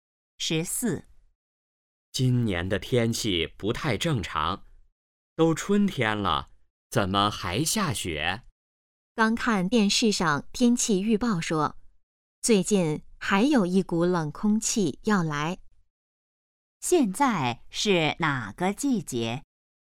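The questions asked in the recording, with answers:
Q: 现在是哪个季节?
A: 春天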